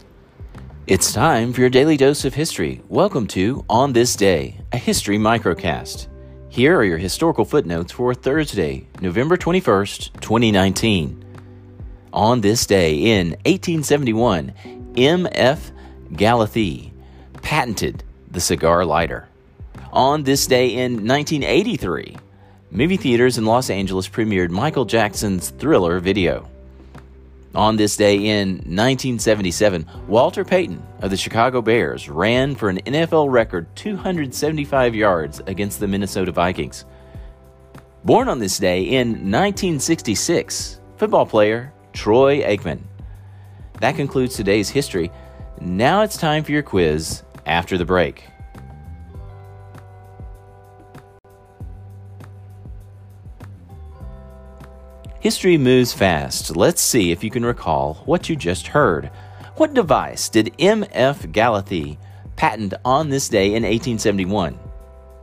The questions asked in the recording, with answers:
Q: What device did M.F. Galathee patent on this day in 1871?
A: Answer, the cigar lighter.